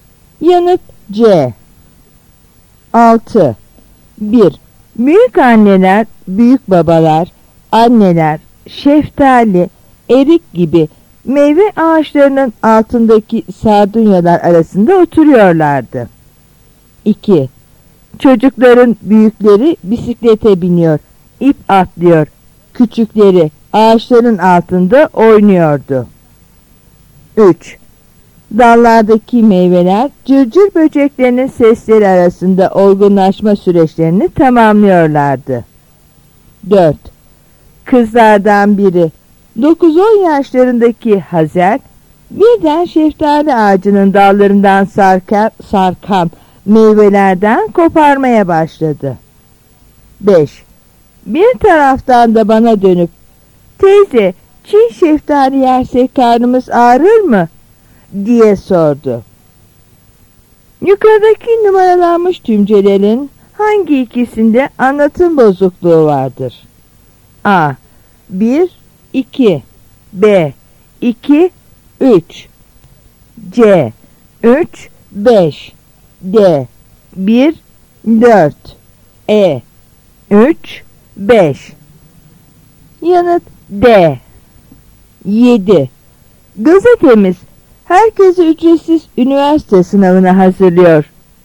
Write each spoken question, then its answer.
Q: Yukarıdaki numaralanmış tümcelerin hangi ikisinde anlatım bozukluğu vardır?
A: Yanıt D.